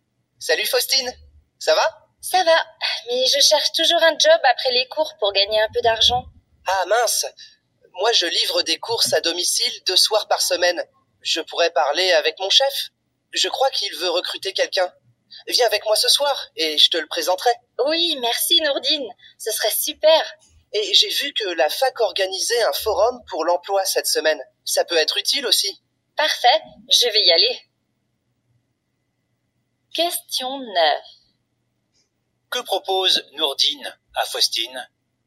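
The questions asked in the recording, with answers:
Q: Que propose Nourdine à Faustine?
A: De venir avec lui ce soir pour la présenter à son chef, qui veut recruter quelqu'un.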